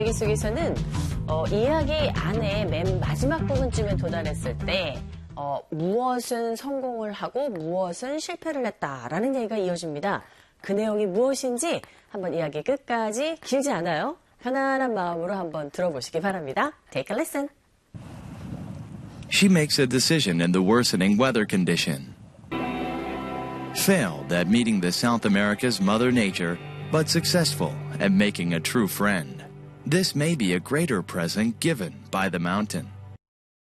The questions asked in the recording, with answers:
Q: 이야기 안에 맨 마지막 부분쯤에 도달했을 때 무엇은 성공을 하고 무엇은 실패를 했다라는 얘기가 이어집니다. 그 내용이 무엇인지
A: 진정한 친구를 사귄 것에는 성공을 했는데 이 대자연의 만남은 실패를 했다라는 부분 캐치하셨겠죠?